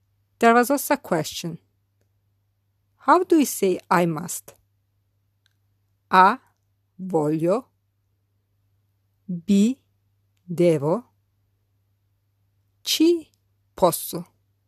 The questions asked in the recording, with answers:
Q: How do we say I must? A voglio B devo Ci posso.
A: The correct answer is B. Devo.